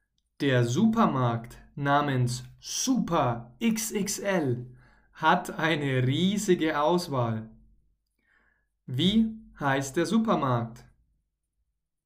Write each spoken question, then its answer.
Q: Wie heißt der Supermarkt?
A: Er heißt Super XXL. Der Supermarkt heißt Super XXL.